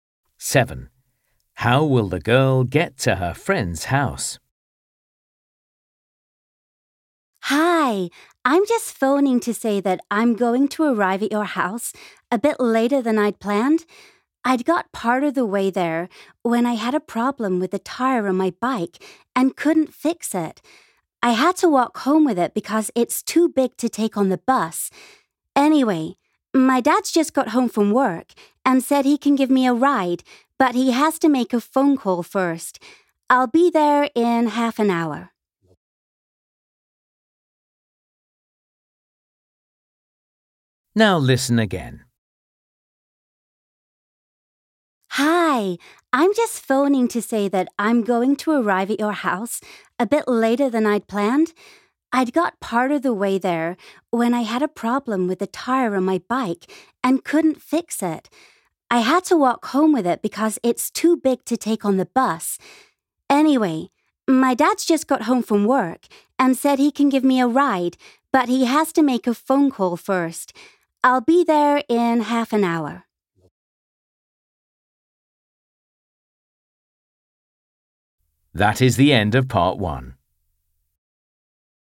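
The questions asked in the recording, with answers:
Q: How will the girl get to her friend's house?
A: by car (her dad will drive her)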